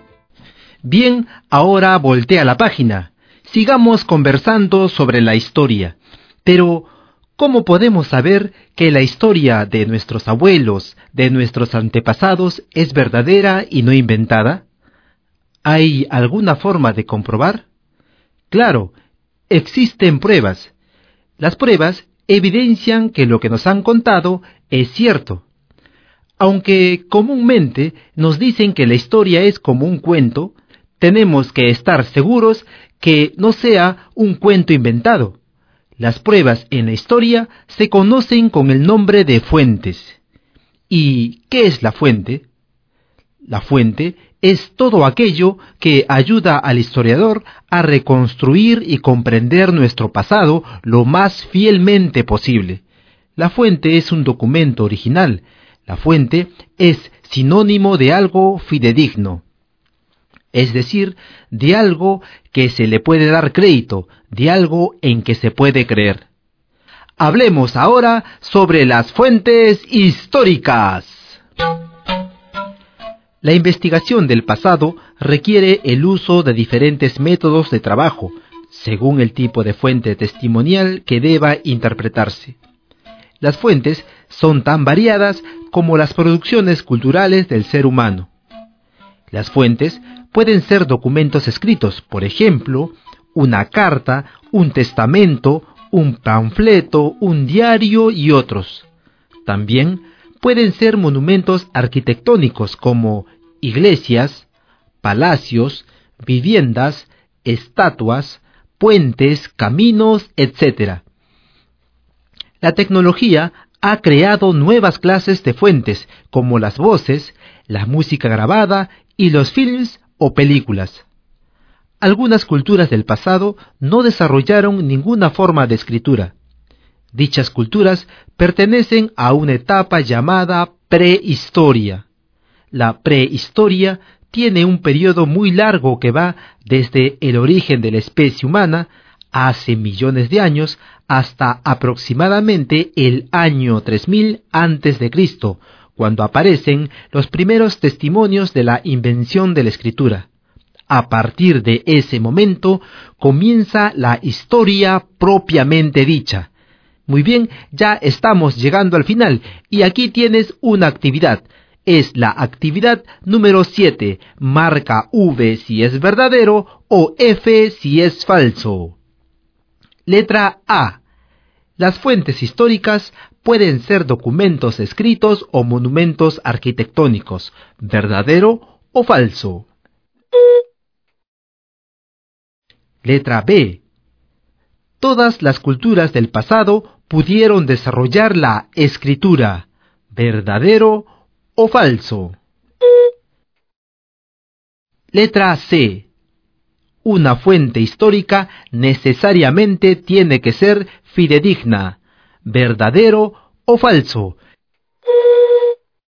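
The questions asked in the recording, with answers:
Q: Las fuentes históricas pueden ser documentos escritos o monumentos arquitectónicos, verdadero o falso.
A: Verdadero

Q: Todas las culturas del pasado pudieron desarrollar la escritura, verdadero o falso.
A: Falso

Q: una fuente histórica necesariamente tiene que ser fidedigna, verdadero o falso.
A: Verdadero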